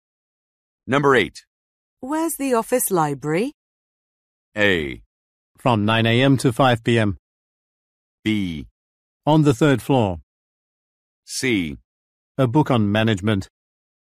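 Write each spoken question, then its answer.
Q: Where's the office library?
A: B: On the third floor.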